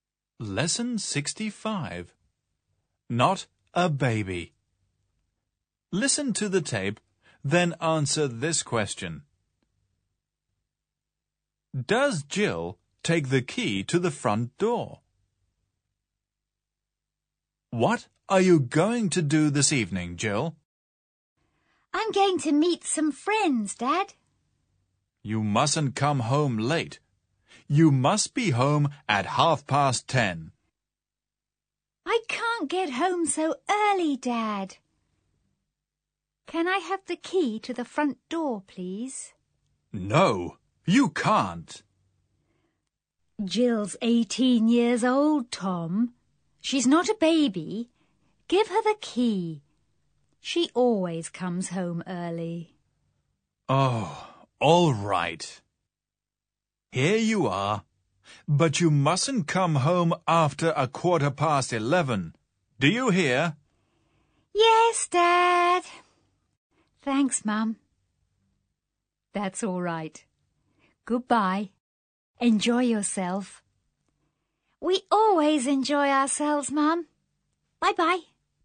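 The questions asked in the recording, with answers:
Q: Does Jill take the key to the front door?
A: Yes, she does.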